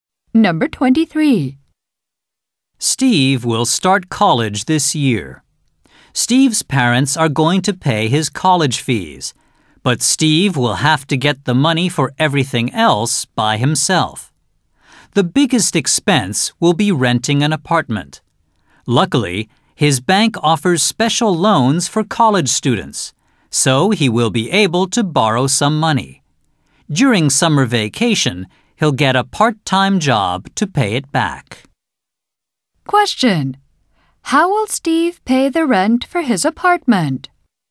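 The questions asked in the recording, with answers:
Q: How will Steve pay the rent for his apartment?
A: By borrowing money through a special student loan from his bank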